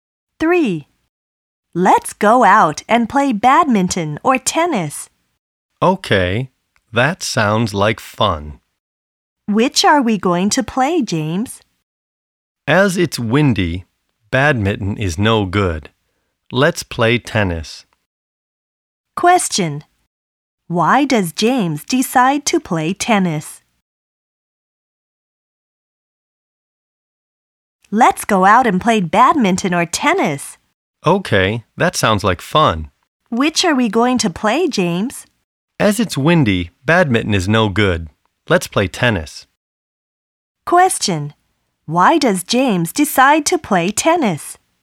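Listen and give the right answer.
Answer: Because it's windy, so badminton is no good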